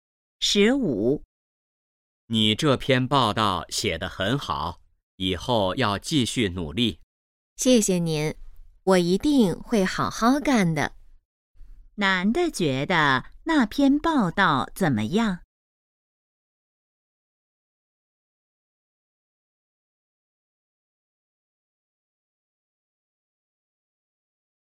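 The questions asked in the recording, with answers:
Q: 男的觉得那篇报道怎么样?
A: 写得很好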